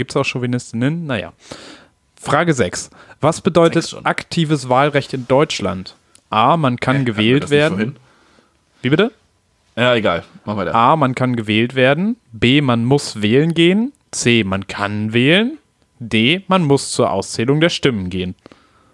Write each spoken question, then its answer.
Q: Was bedeutet aktives Wahlrecht in Deutschland?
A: Und aktives ist, man kann wählen.